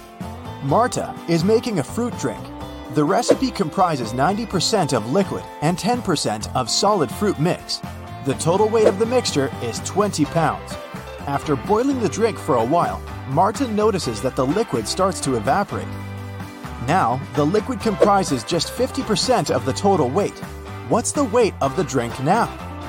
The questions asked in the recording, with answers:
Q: What's the weight of the drink now?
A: So the overall weight of Marta's fruit drink is 4 pounds.